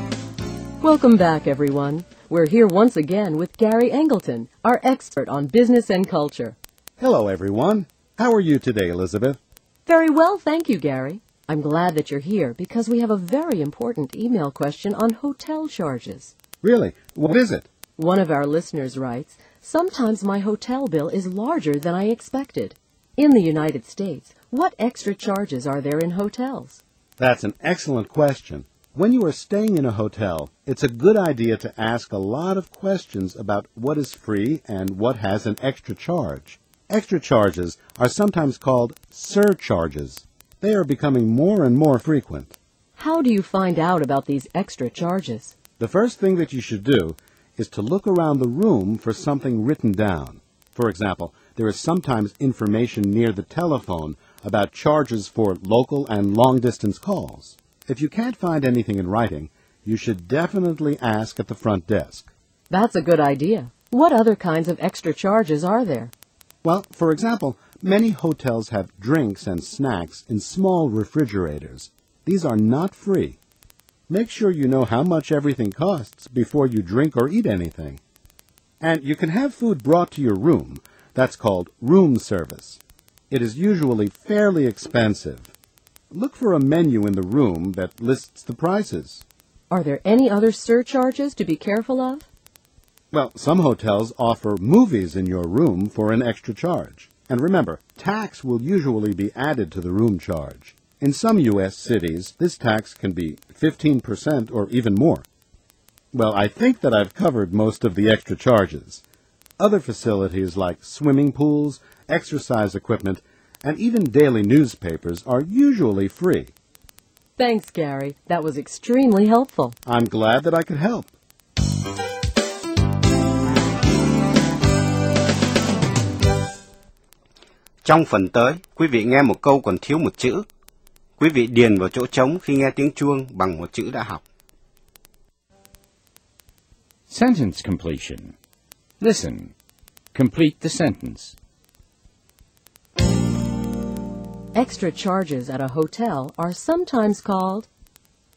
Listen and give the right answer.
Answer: surcharges. They're called surcharges.